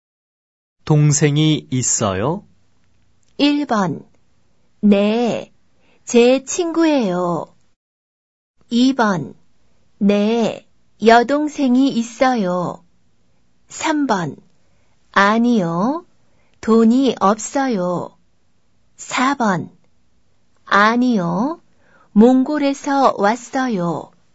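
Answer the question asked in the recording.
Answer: 2: 네, 여동생이 있어요.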